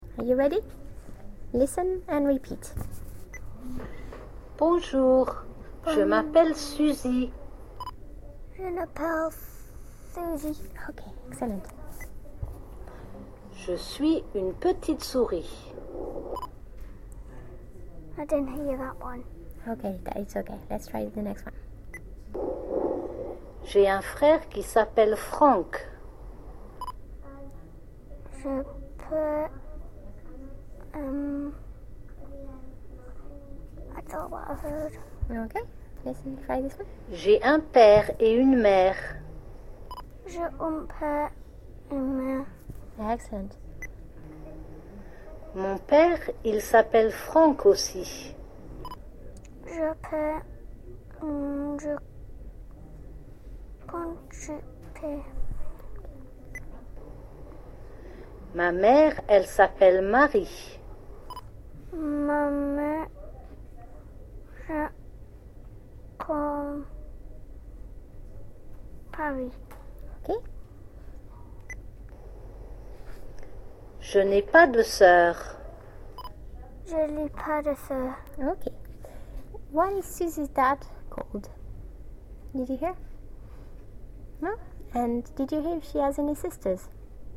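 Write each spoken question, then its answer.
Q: What is Susie's dad called?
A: Franck

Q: And did you hear if she has any sisters?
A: No, she has no sisters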